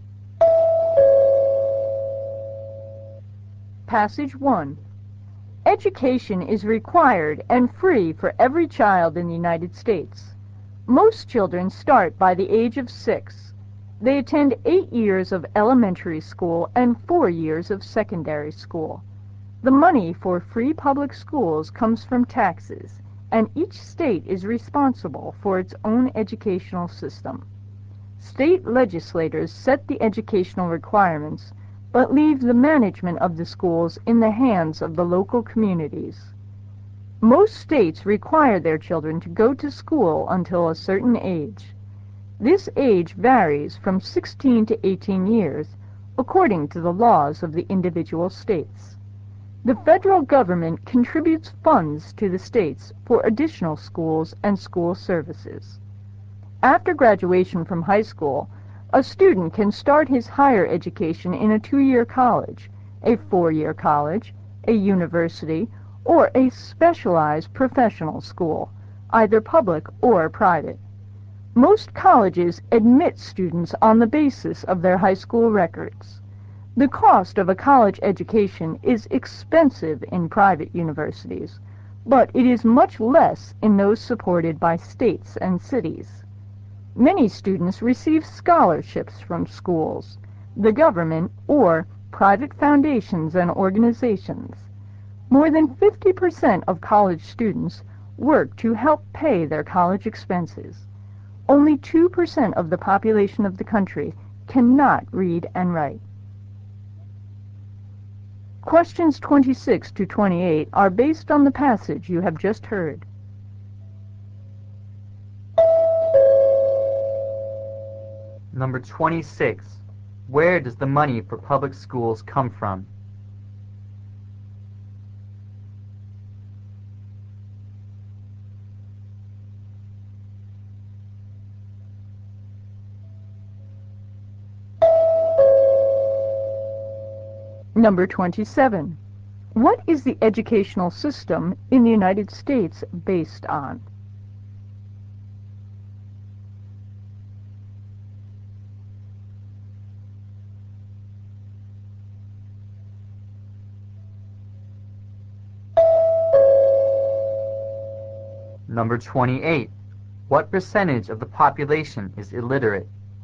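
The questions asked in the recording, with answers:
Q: Where does the money for public schools come from?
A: Taxes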